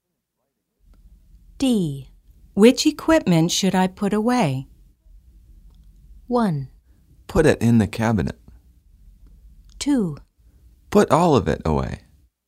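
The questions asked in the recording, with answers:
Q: Which equipment should I put away?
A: 2: Put all of it away.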